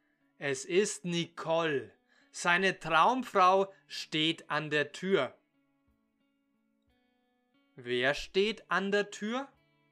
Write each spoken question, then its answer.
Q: Wer steht an der Tür?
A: Seine Traumfrau Nicole, sie steht an der Tür.